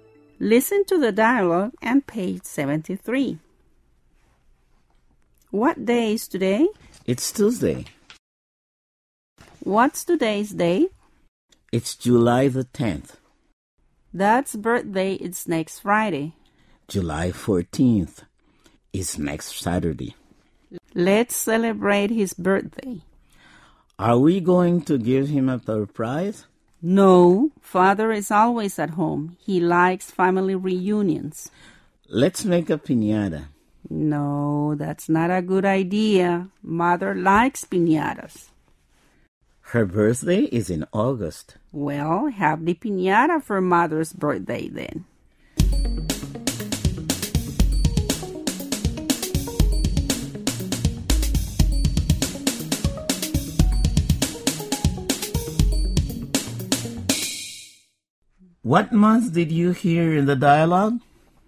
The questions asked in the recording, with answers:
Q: What month did you hear in the dialogue?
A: July, and August. That's correct.